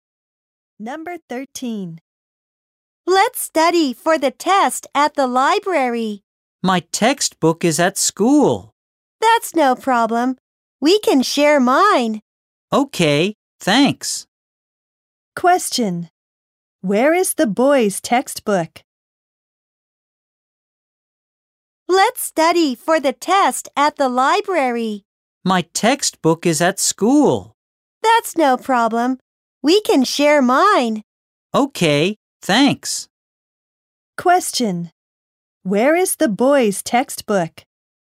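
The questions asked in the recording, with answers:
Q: Where is the boy's textbook?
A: At school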